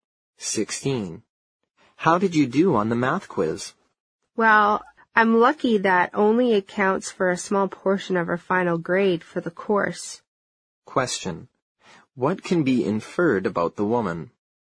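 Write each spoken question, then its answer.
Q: What can be inferred about the woman?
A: She did poorly on the math quiz.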